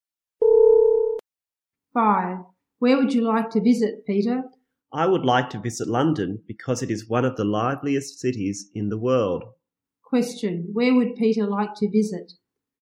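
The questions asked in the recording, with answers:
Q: Where would Peter like to visit?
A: London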